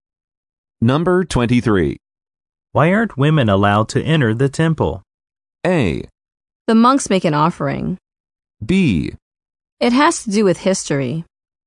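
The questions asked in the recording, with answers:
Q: Why aren't women allowed to enter the temple?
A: B: It has to do with history.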